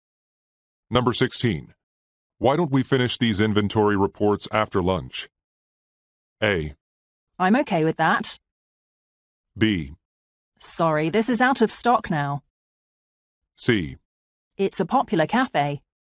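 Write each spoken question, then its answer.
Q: Why don't we finish these inventory reports after lunch?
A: A: I'm okay with that.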